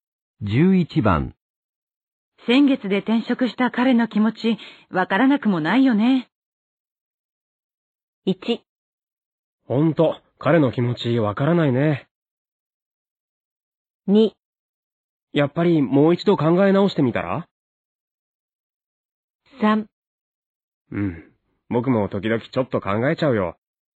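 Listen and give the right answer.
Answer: 3: うん、僕も時々ちょっと考えちゃうよ。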